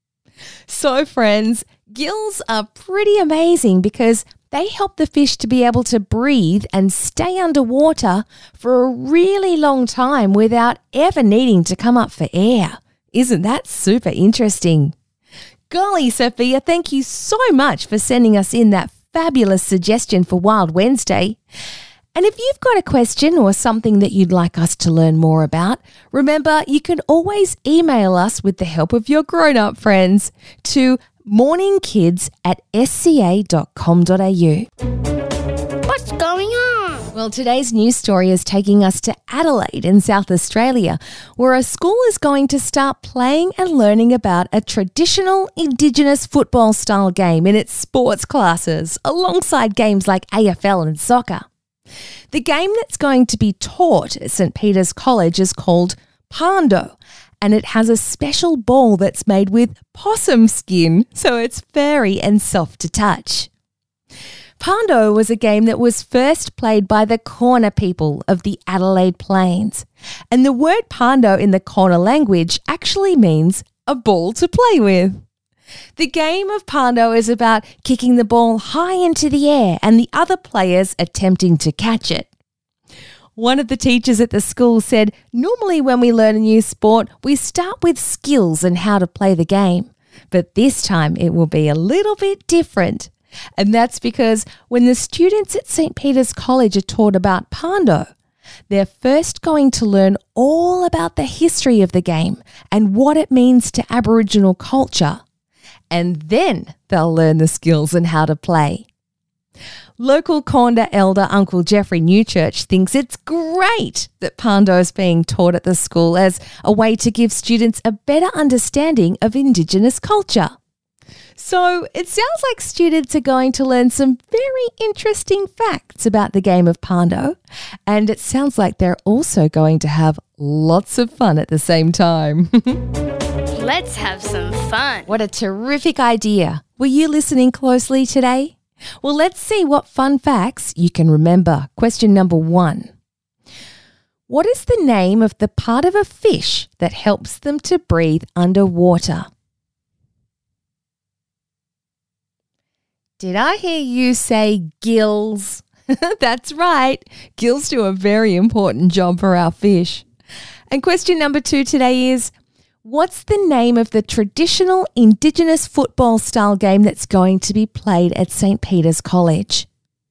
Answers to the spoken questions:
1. Did I hear you say gills?
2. Pando is the correct answer